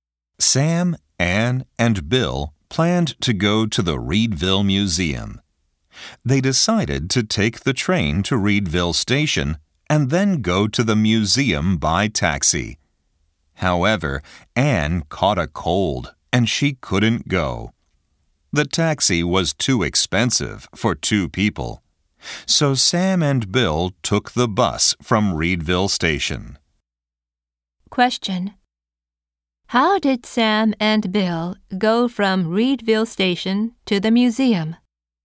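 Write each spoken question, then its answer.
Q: How did Sam and Bill go from Reedville Station to the museum?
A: By bus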